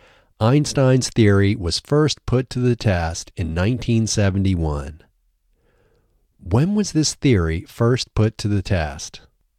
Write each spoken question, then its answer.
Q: When was this theory first put to the test?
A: This theory was first put to the test in 1971.